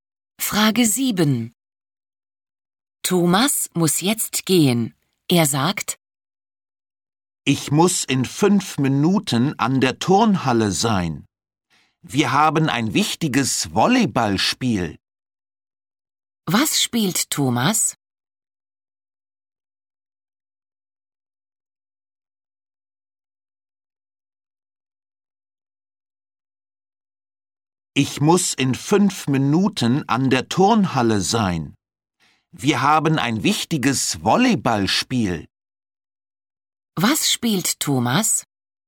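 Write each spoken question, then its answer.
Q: Was spielt Thomas?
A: Volleyball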